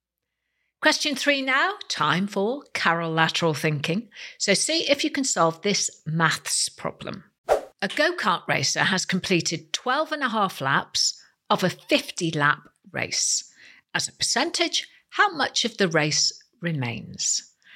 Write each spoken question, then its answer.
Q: As a percentage, how much of the race remains?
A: Well, the answer is 75%.